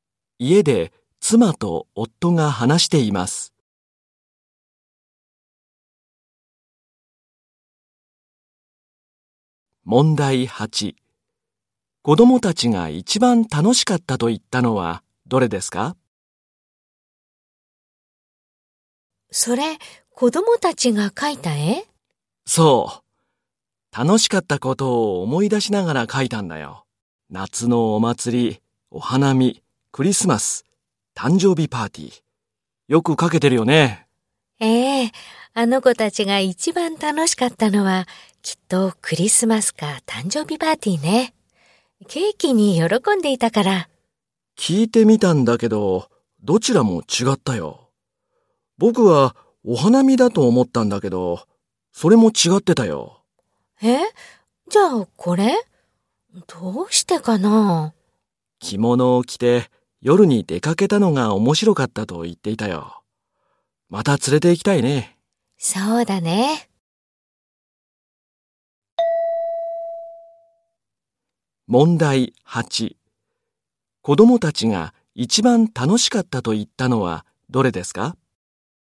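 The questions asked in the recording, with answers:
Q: 子供たちが一番楽しかったと言ったのはどれですか?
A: 夏のお祭り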